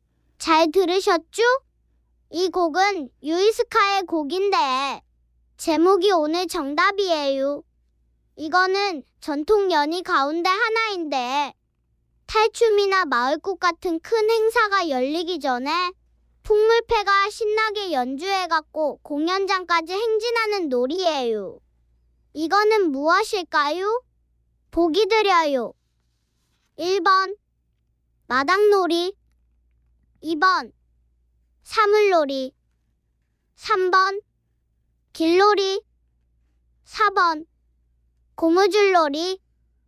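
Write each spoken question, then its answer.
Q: 이거는 무엇일까요? 보기 드려요. 1번 마당놀이, 2번 사물놀이, 3번 길놀이, 4번 고무줄놀이.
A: 3: 길놀이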